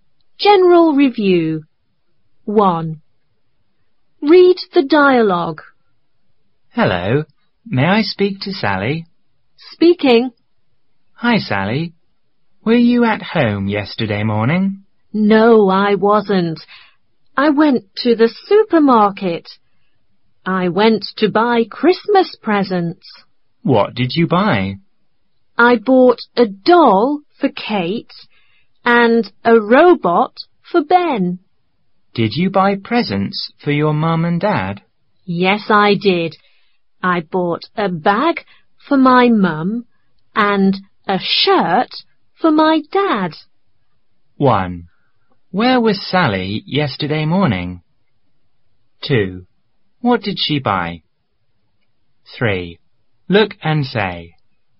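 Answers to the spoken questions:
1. At the supermarket.
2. A doll, a robot, a bag and a shirt.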